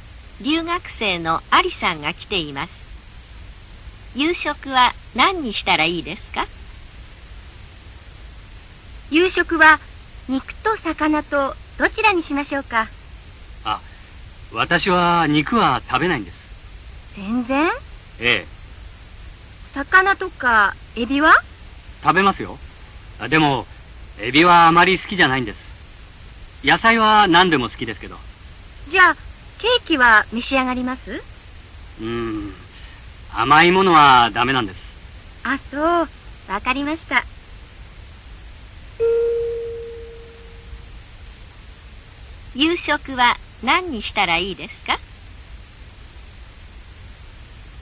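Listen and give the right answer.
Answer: 魚と野菜(肉、エビ、ケーキはだめ)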